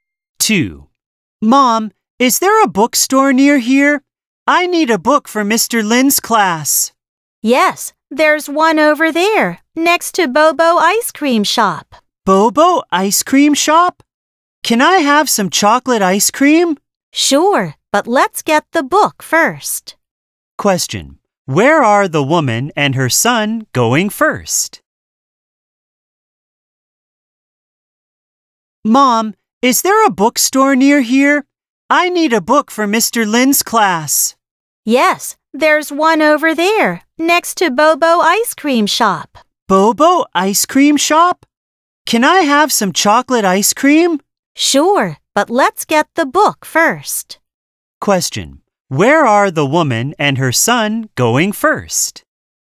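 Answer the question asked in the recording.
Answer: The bookstore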